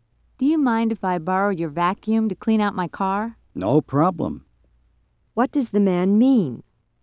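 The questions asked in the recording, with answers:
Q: What does the man mean?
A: He will lend the woman his vacuum.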